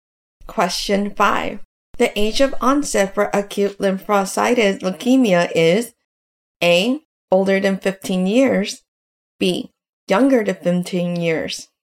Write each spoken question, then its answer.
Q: The age of onset for acute lymphocytic leukemia is A, older than 15 years, B, younger than 15 years.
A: The correct answer is B, younger than 15 years.